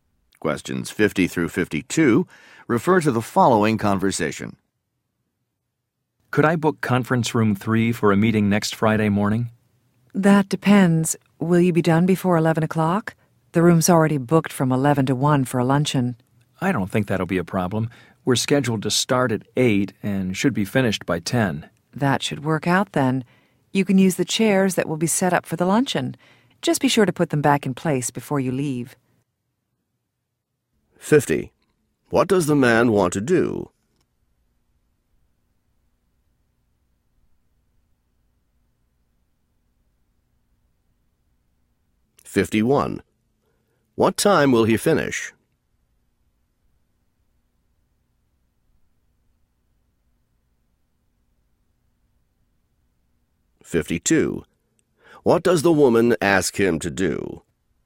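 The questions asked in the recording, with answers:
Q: What does the man want to do?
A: Book a conference room for a meeting

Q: What time will he finish?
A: By 10

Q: What does the woman ask him to do?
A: Put the chairs back in place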